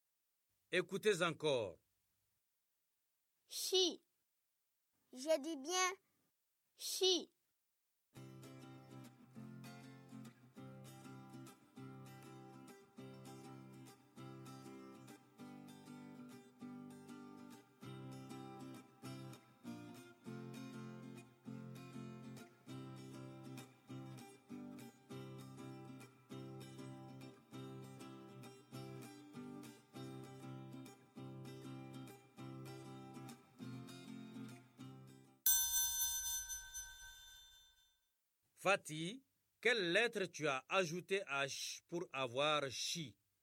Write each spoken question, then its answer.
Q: Fatih, quelle lettre tu as ajoutée à « ch » pour avoir « chi » ?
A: Monsieur I.